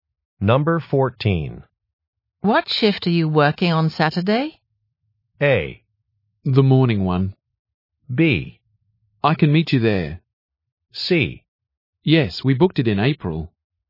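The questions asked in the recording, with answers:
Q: What shift are you working on Saturday?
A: A: The morning one.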